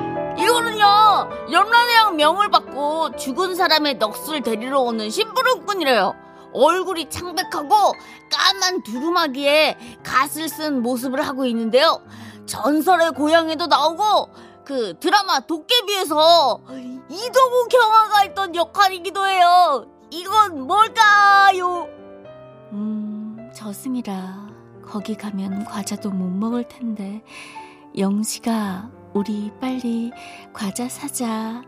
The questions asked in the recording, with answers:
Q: 이건 뭘까요?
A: 정답 저승사자.